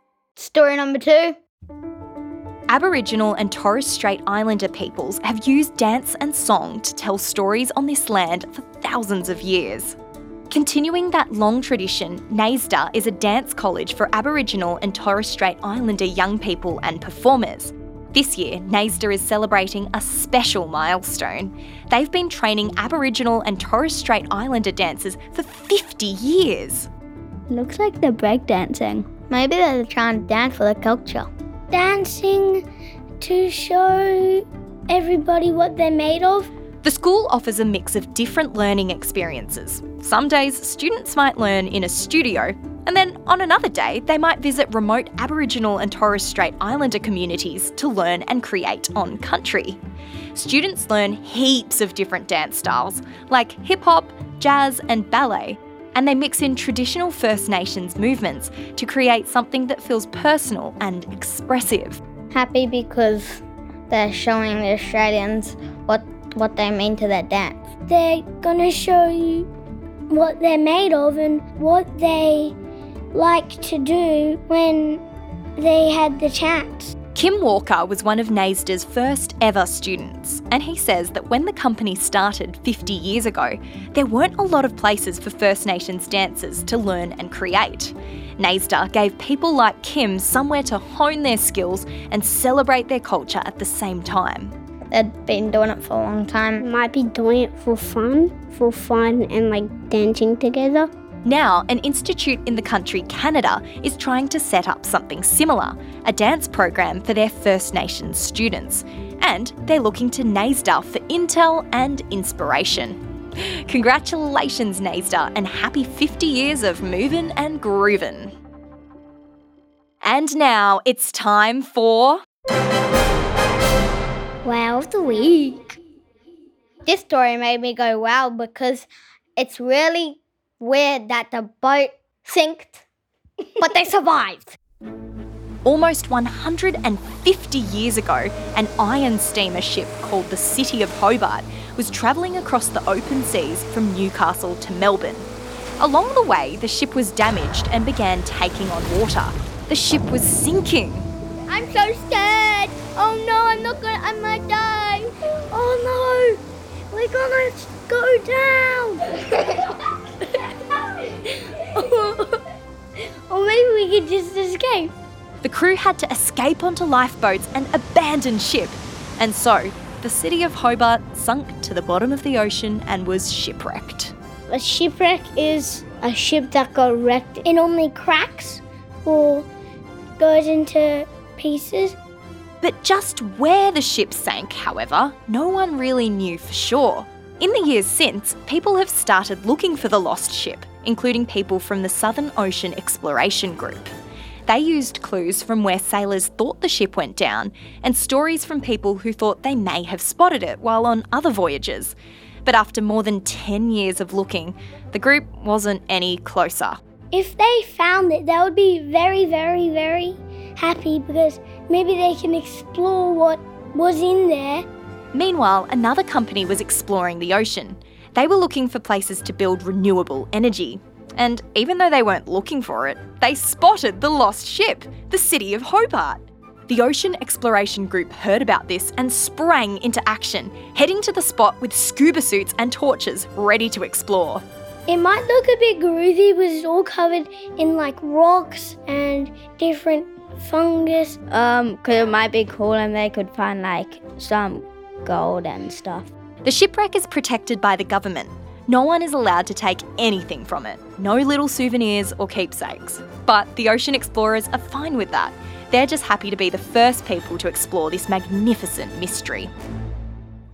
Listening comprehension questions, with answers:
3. How many years of dancing is the company celebrating?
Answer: 50 years

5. Which Australian city was the sunken boat named after?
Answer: The City of Hobart